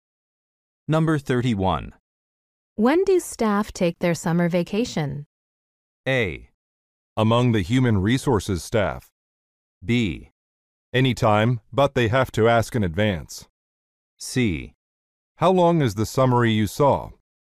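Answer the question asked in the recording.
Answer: B: Anytime, but they have to ask in advance.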